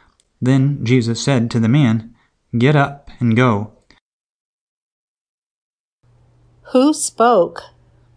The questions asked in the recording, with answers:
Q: Who spoke?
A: Jesus spoke.